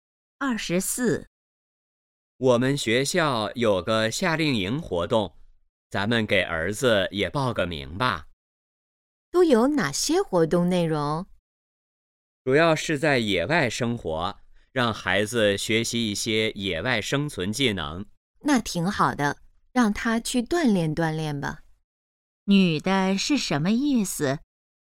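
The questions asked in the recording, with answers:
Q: 女的是什么意思?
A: 同意让儿子参加夏令营锻炼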